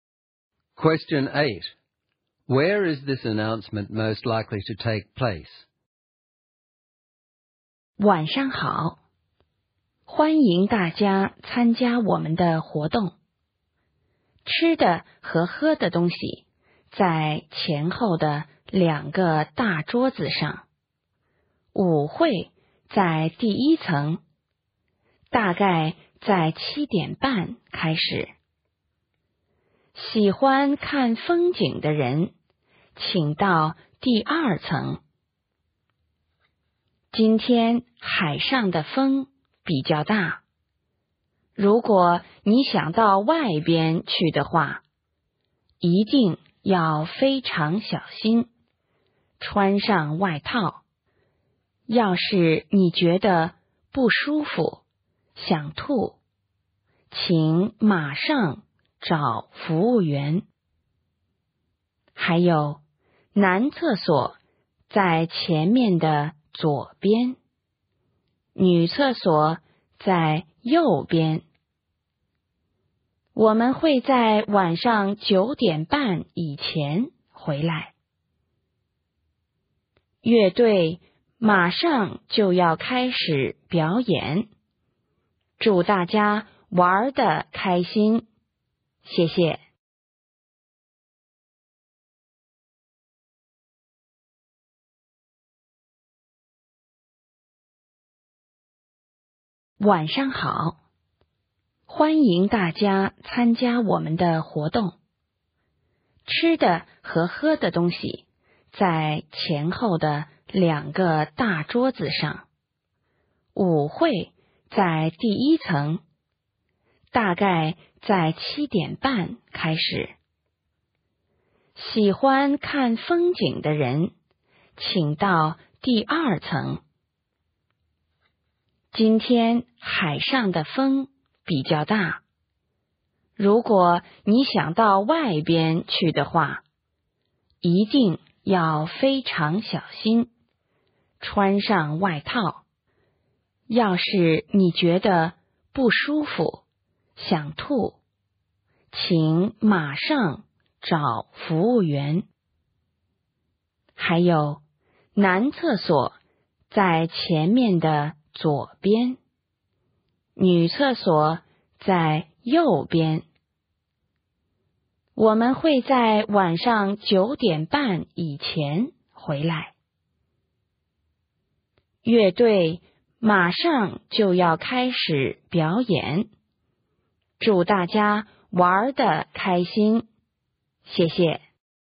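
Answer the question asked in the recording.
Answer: On a boat or cruise ship at sea.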